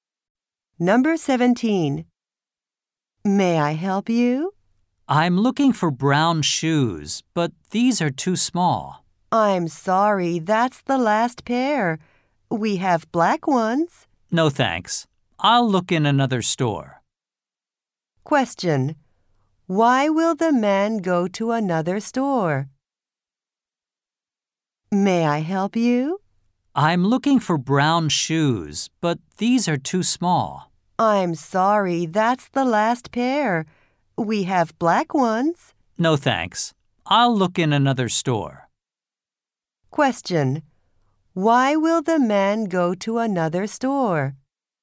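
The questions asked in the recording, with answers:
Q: Why will the man go to another store?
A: The brown shoes are too small and that was the last pair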